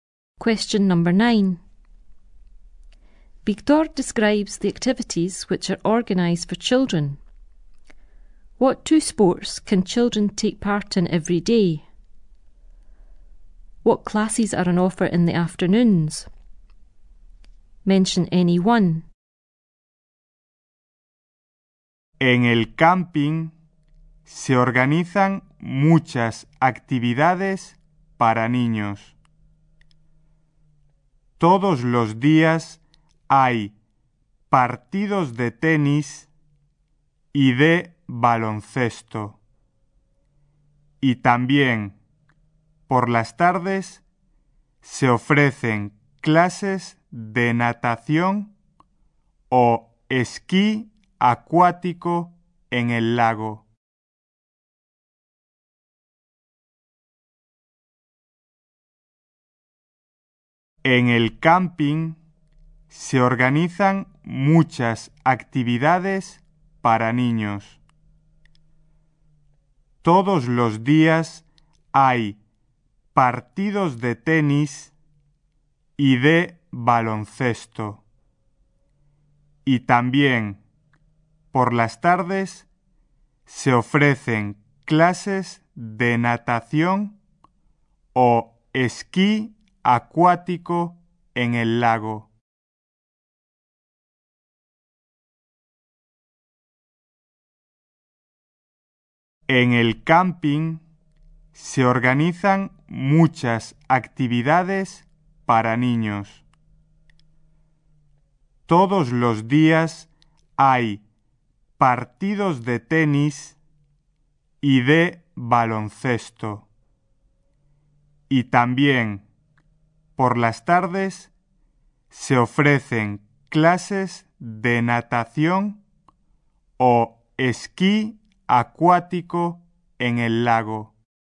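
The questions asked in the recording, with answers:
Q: What two sports can children take part in every day?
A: Tennis and basketball

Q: What classes are on offer in the afternoons?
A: Swimming or water-skiing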